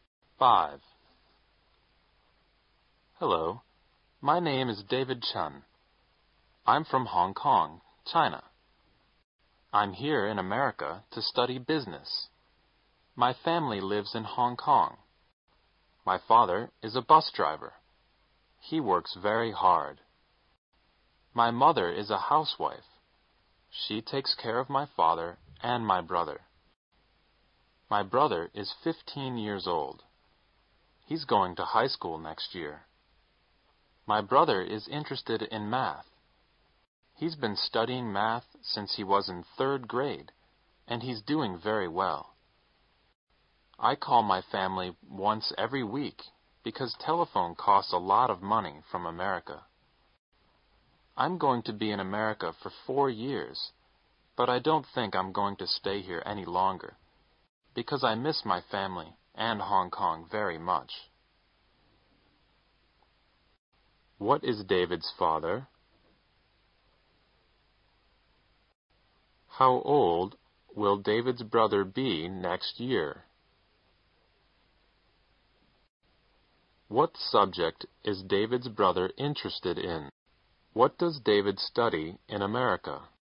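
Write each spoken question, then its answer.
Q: What is David's father?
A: A bus driver

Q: How old will David's brother be next year?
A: 16

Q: What subject is David's brother interested in?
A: Math

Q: What does David study in America?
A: Business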